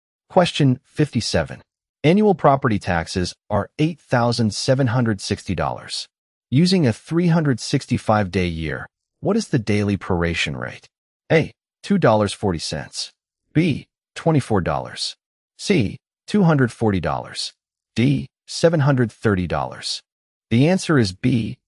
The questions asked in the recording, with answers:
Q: Using a 365-day year, what is the daily proration rate?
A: The answer is B.